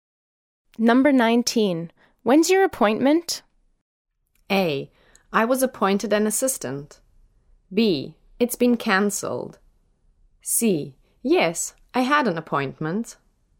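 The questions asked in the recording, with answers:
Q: When's your appointment?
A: B: It's been cancelled.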